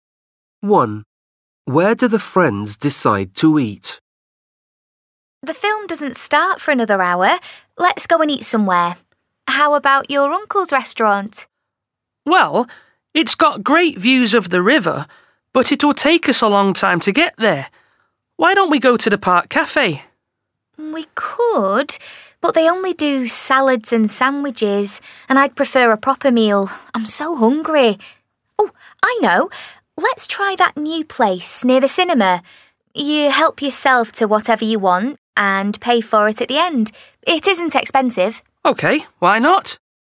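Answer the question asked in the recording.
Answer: the new self-service place near the cinema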